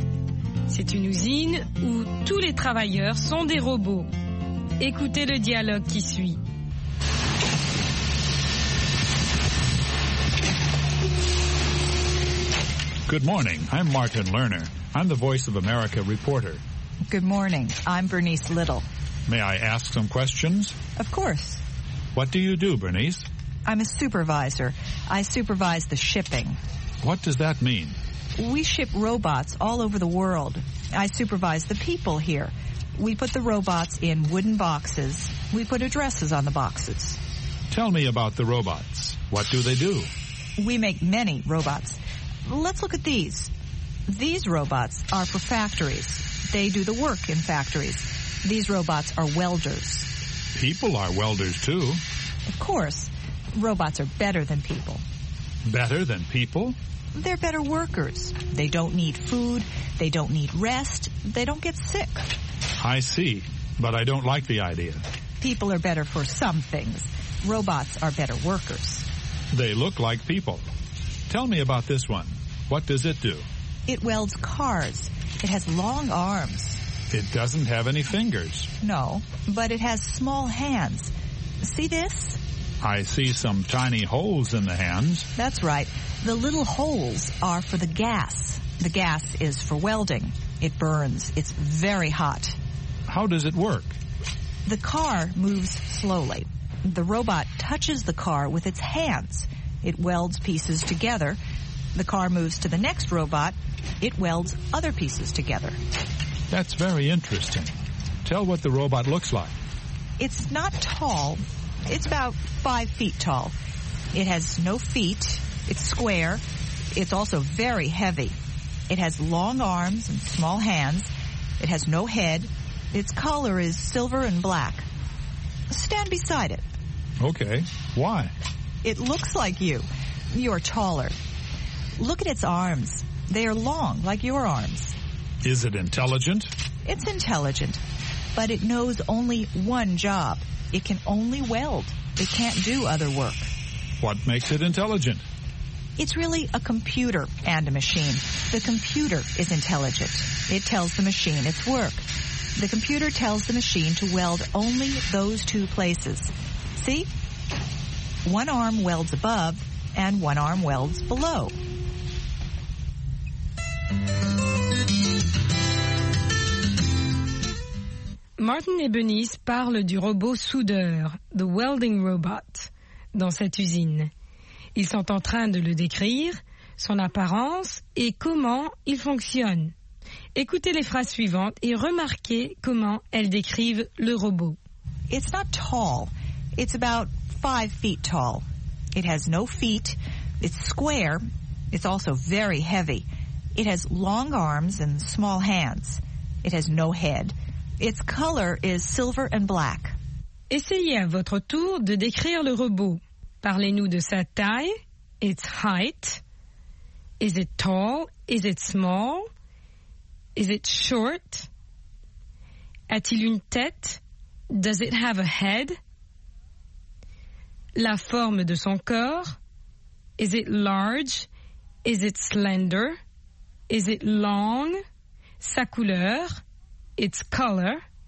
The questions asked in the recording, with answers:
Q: Is it tall?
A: not tall

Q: Does it have a head?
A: no head

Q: Its color?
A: silver and black